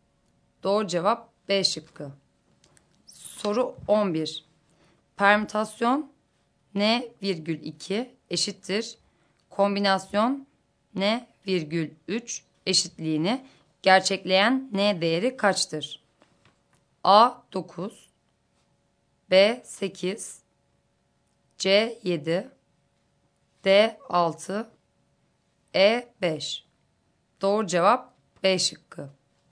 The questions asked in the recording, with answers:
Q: Kombinasyon N virgül 3 eşitliğini gerçekleyen N değeri kaçtır?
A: Doğru cevap B şıkkı.